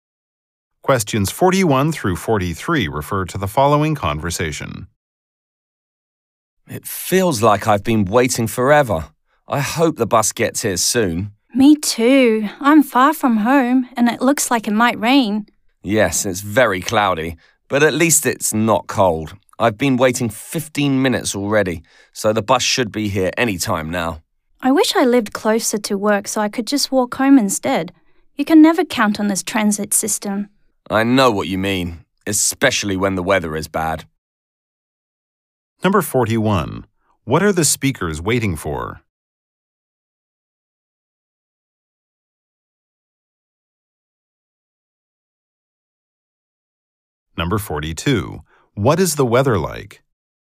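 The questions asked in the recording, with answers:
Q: What are the speakers waiting for?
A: A bus

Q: What is the weather like?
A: Cloudy but not cold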